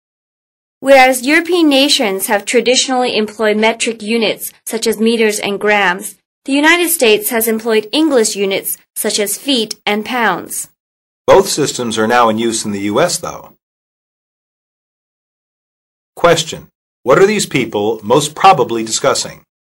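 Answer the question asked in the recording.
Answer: Systems of measurement (metric and English units)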